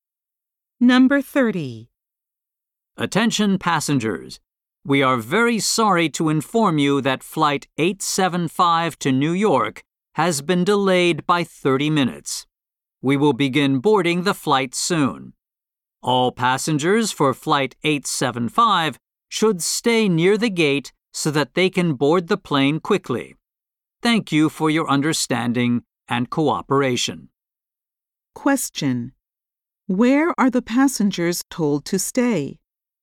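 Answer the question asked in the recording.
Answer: Near the gate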